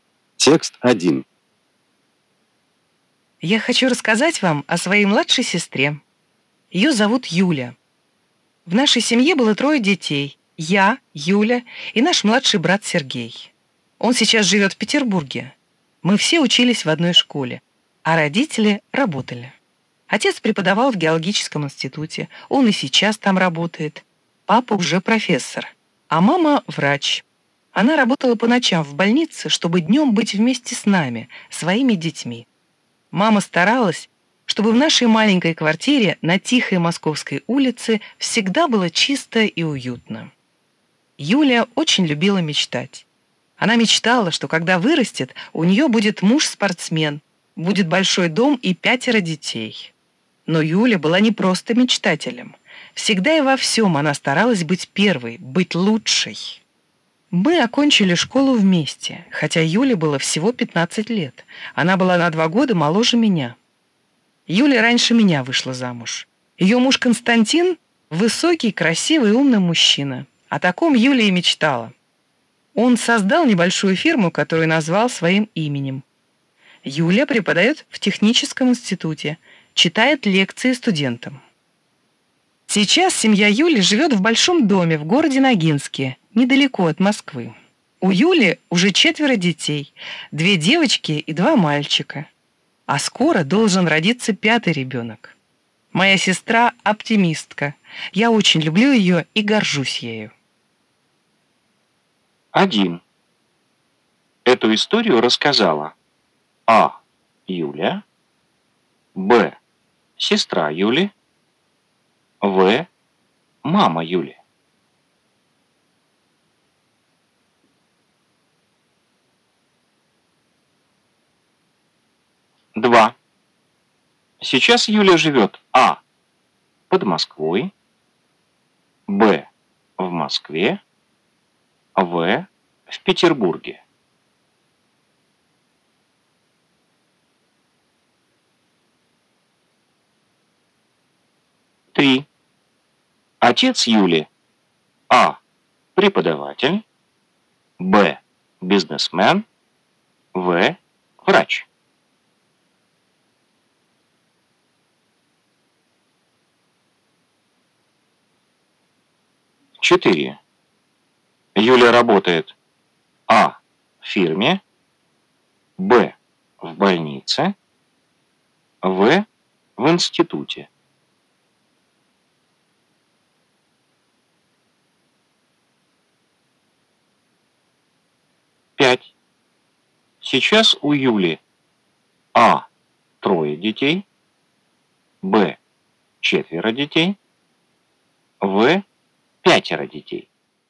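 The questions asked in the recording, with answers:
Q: Эту историю рассказала А. Юля, Б. сестра Юли, В. мама Юли.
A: Б: сестра Юли

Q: Сейчас Юля живет А. под Москвой, Б. в Москве, В. в Петербурге.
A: А: под Москвой

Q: Отец Юли А. преподаватель, Б. бизнесмен, В. врач.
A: А: преподаватель

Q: Юля работает А. в фирме, Б. в больнице, В. в институте.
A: В: в институте

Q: Сейчас у Юли А. 3 детей, Б. 4 детей, В. 5 детей.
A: Б: 4 детей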